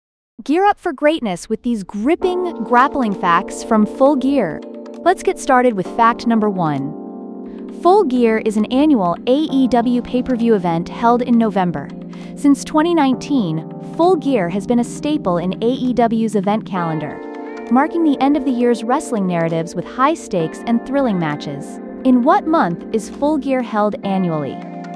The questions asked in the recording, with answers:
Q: In what month is Full Gear held annually?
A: Correct answer, November.